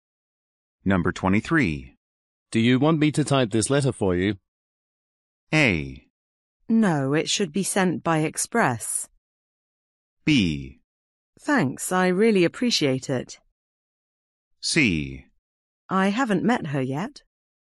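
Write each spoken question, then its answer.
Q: Do you want me to type this letter for you?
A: B: Thanks, I really appreciate it.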